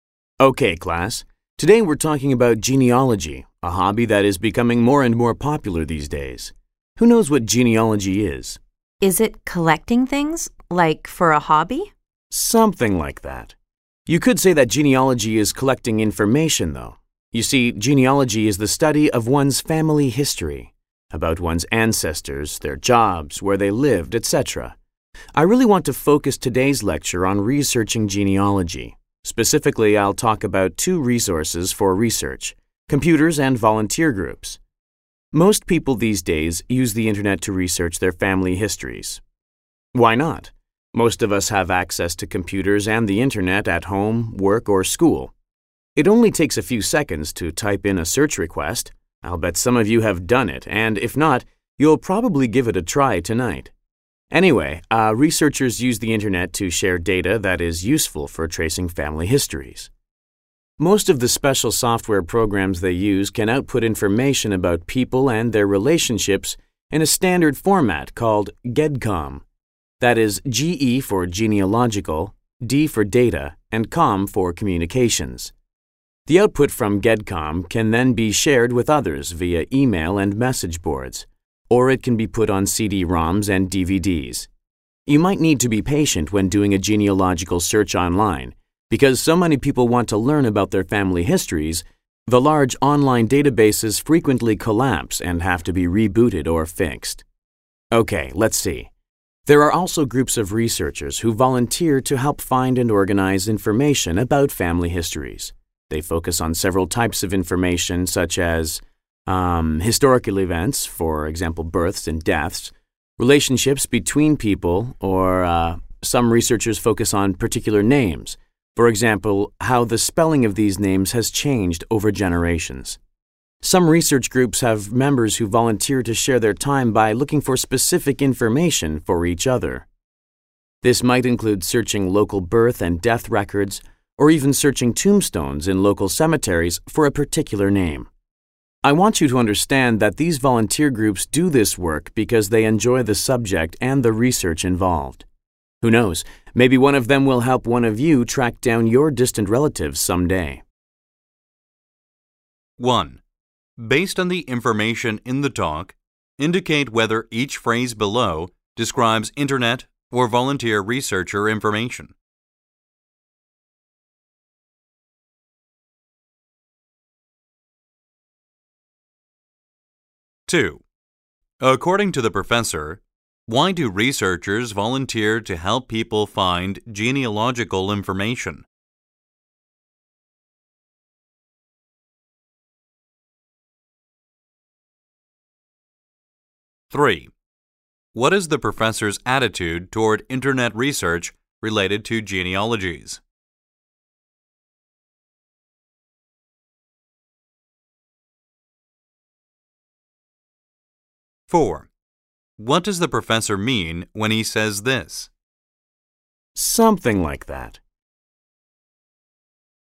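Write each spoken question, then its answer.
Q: According to the professor, why do researchers volunteer to help people find genealogical information?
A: Because they enjoy the subject and the research involved

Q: What does the professor mean when he says this?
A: The student's answer is partly right; genealogy is a kind of collecting, but of information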